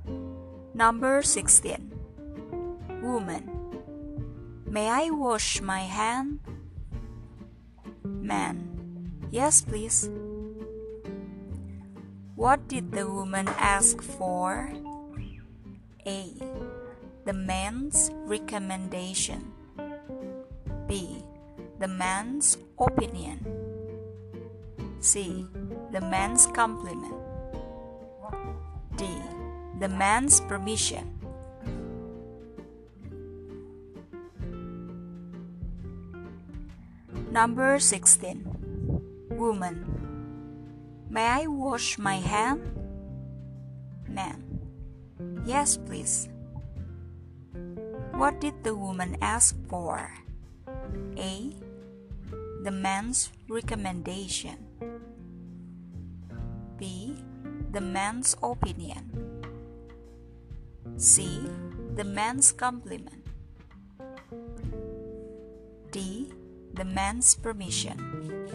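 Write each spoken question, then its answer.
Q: What did the woman ask for?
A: D: The man's permission.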